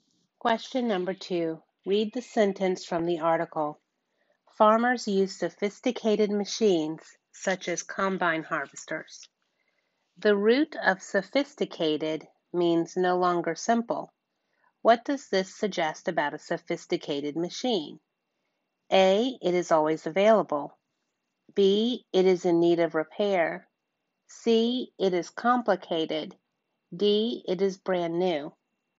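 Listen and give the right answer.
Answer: C: It is complicated.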